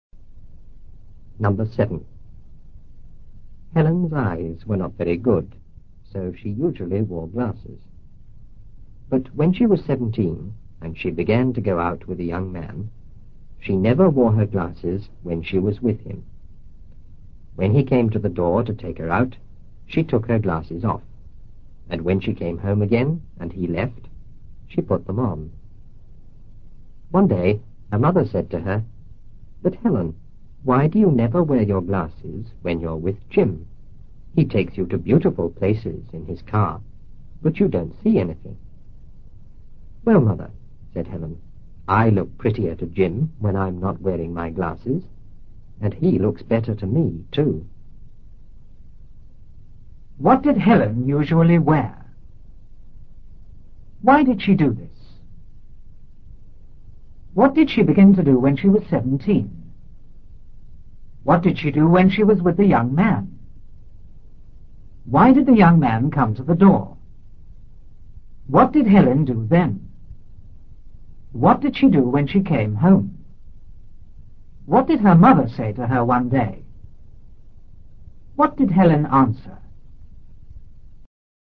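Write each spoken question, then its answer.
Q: What did Helen usually wear?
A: Glasses

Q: Why did she do this?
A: Her eyes were not very good

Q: What did she begin to do when she was 17?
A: Go out with a young man

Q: What did she do when she was with the young man?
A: She never wore her glasses

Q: Why did the young man come to the door?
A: To take her out

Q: What did Helen do then?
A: She took her glasses off

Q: What did she do when she came home?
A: She put her glasses on

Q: What did her mother say to her one day?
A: Why do you never wear your glasses when you're with Jim? He takes you to beautiful places but you don't see anything

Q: What did Helen answer?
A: She looks prettier to Jim without her glasses, and he looks better to her too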